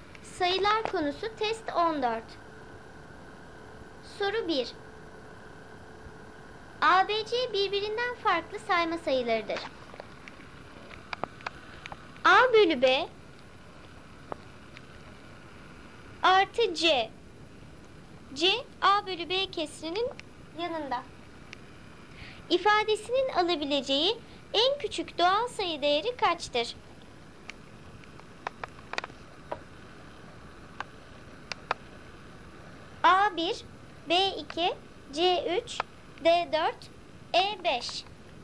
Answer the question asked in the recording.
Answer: Doğru cevap C3.